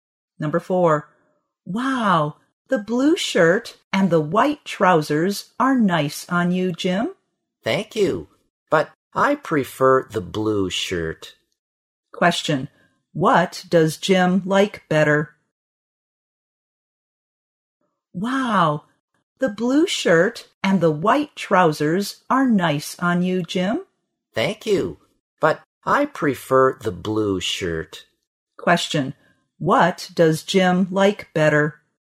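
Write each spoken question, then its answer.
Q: what does Jim like better?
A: The blue shirt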